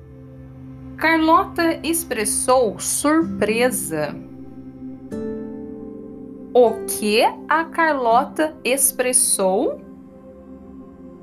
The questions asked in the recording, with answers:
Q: O que a Carlota expressou?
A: Surpresa.